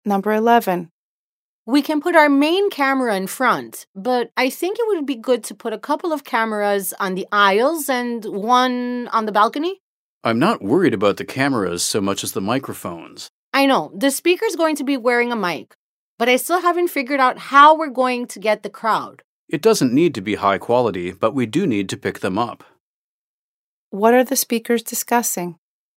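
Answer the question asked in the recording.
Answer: Where to put cameras and microphones to record a speech in front of a crowd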